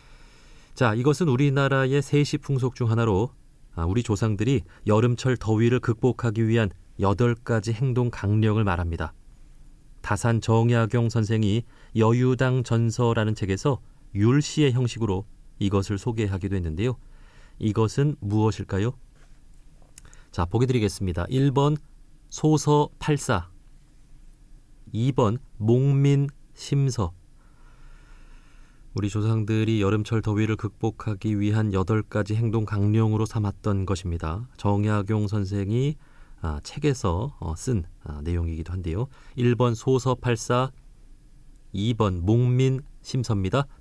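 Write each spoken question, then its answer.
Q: 이것은 무엇일까요?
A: 1: 소서 팔사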